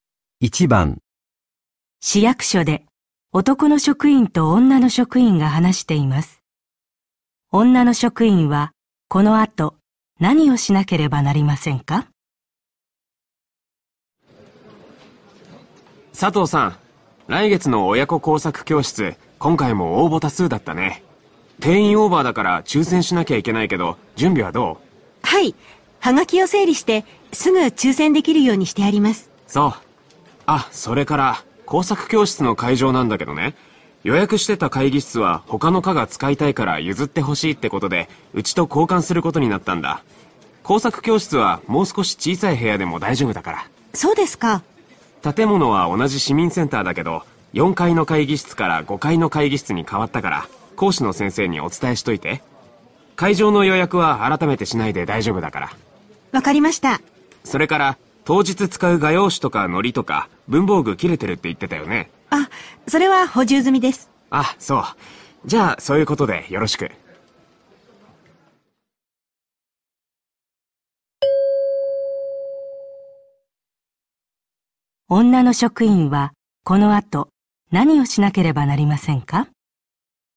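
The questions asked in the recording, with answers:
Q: 女の職員はこの後何をしなければなりませんか?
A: 講師の先生に会場が5階の会議室に変わったことを伝える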